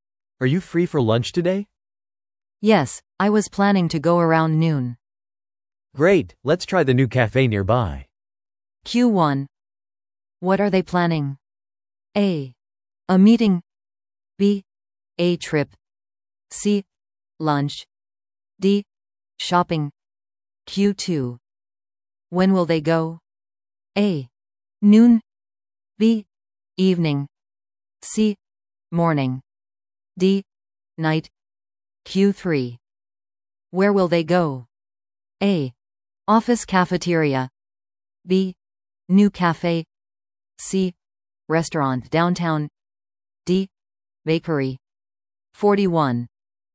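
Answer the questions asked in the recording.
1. C: Lunch.
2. A: Noon.
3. B: New cafe.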